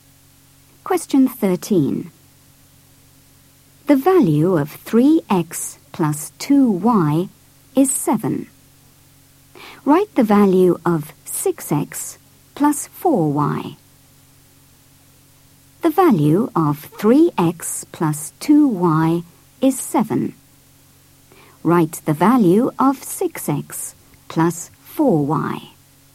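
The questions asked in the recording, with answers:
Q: Write the value of 6x plus 4y.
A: 14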